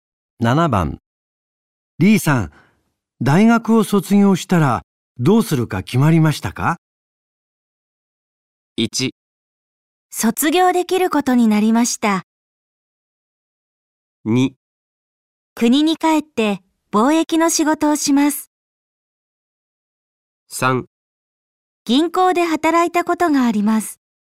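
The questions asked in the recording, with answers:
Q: リーさん、大学を卒業したらどうするか決まりましたか?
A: 2: 国に帰って貿易の仕事をします。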